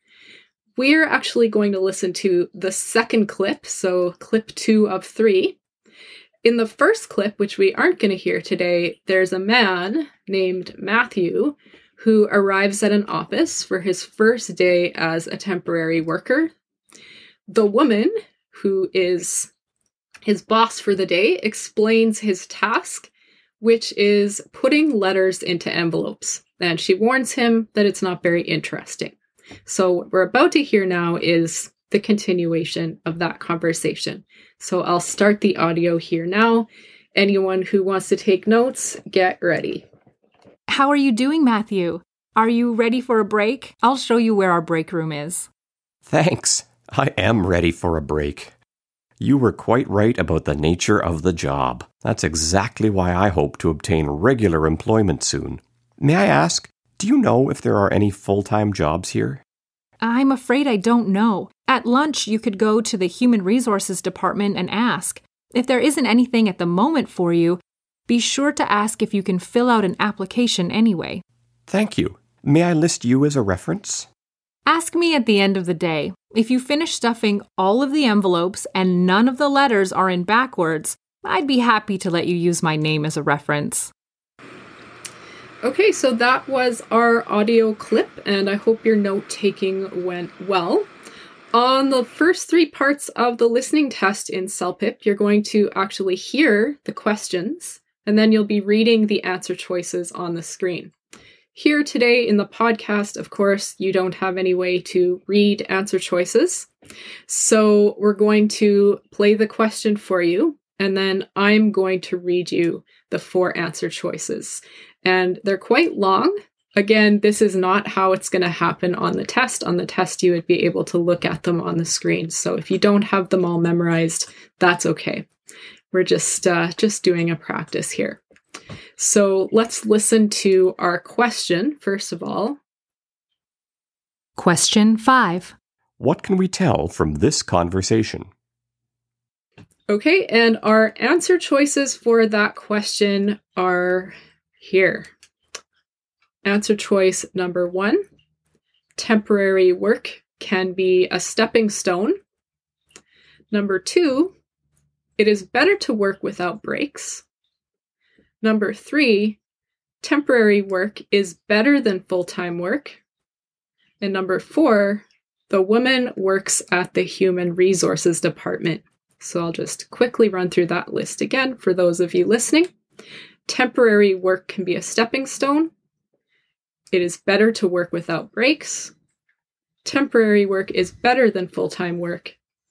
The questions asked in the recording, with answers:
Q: What can we tell from this conversation?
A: The right answer is that first option.